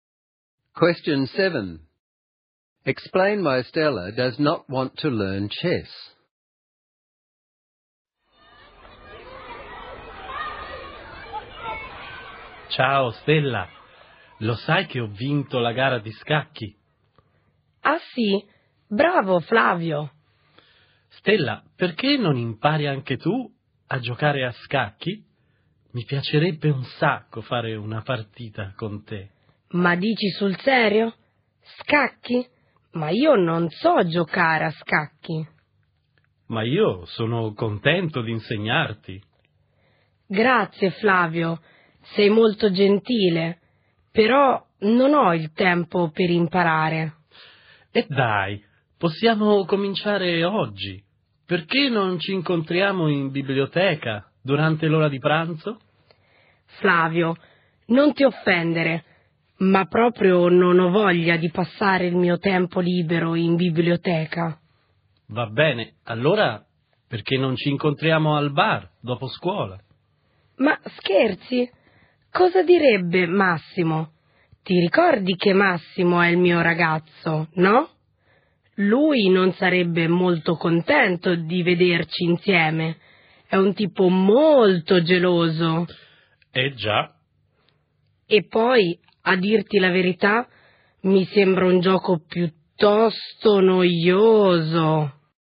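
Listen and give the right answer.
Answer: She has no time, doesn't want to spend her free time in the library, her jealous boyfriend Massimo wouldn't like it, and she finds chess boring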